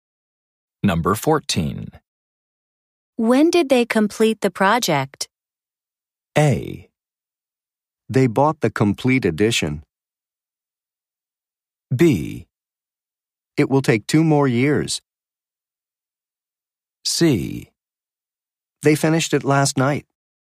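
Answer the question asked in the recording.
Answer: C: They finished it last night.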